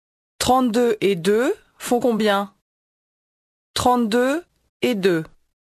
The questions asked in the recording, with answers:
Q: 32 et 2 font combien?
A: 34.